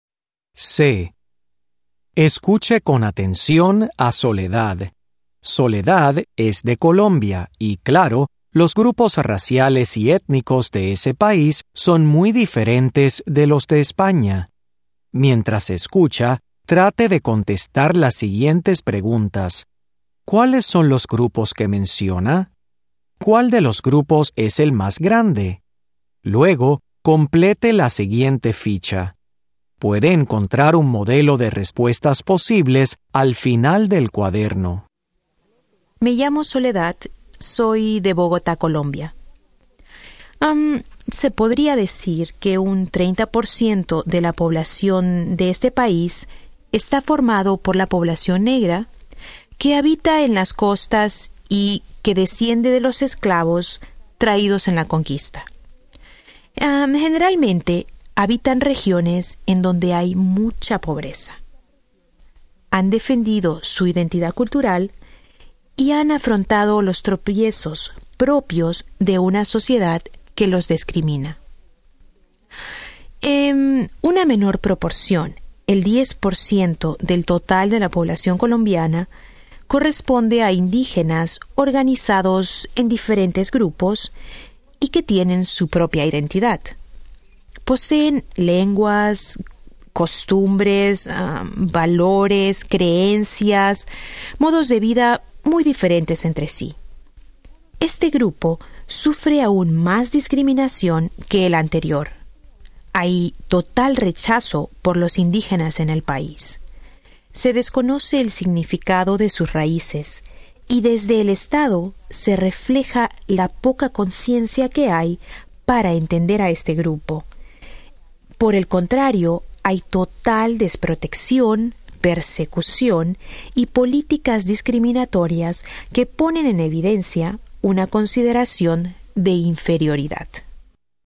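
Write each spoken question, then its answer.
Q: ¿Cuáles son los grupos que menciona?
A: La población negra y los indígenas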